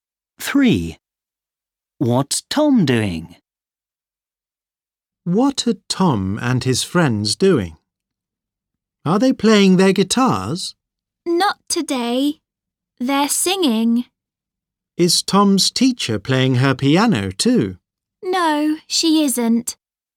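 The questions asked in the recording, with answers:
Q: What's Tom doing?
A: singing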